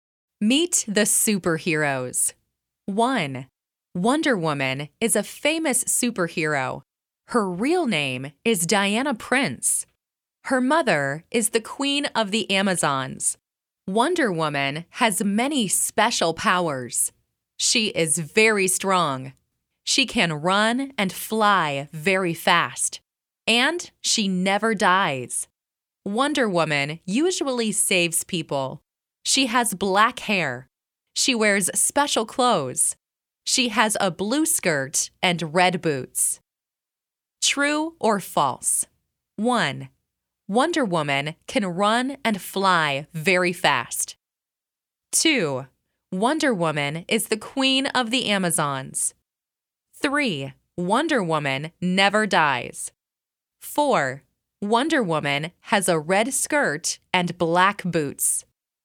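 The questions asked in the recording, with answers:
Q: Wonder Woman can run and fly very fast.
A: True

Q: Wonder Woman is the queen of the Amazons.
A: False

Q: Wonder Woman never dies.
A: True

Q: Wonder Woman has a red skirt and black boots.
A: False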